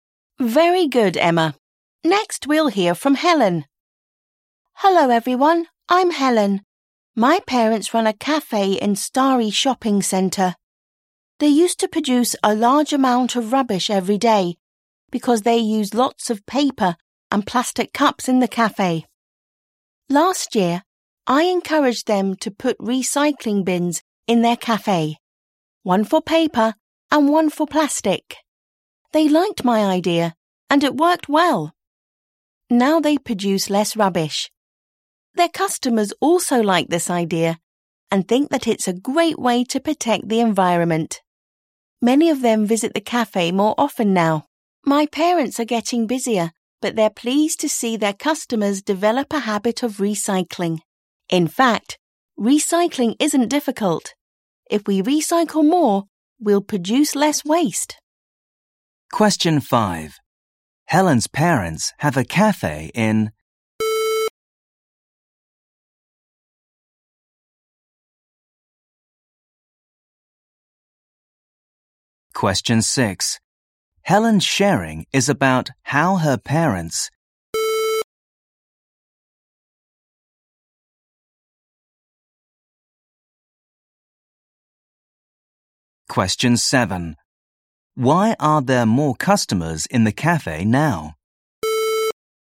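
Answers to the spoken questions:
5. Starry Shopping Centre
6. produce less rubbish by recycling
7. They like the recycling idea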